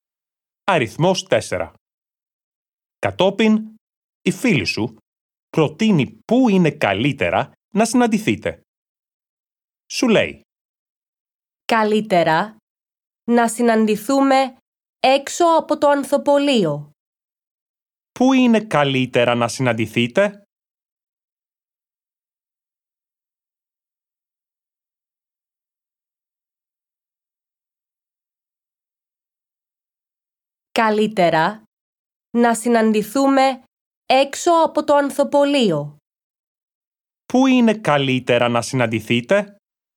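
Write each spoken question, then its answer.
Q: Πού είναι καλύτερα να συναντηθείτε?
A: Έξω από το ανθοπωλείο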